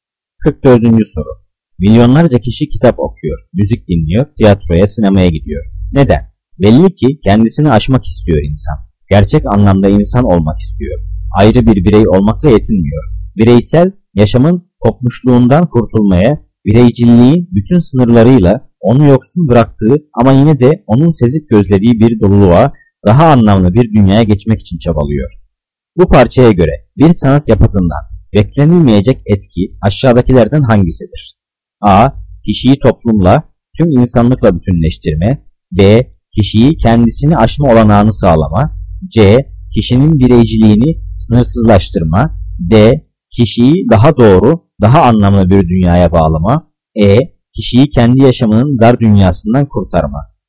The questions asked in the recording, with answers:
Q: Bu parçaya göre bir sanat yapıtından beklenilmeyecek etki aşağıdakilerden hangisidir?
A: Cevap C. Kişinin bireyciliğini sınırsızlaştırma.